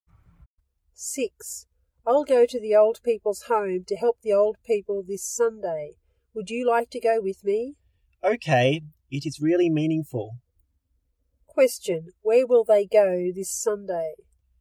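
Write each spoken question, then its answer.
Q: Question, where will they go this Sunday?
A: To the old people's home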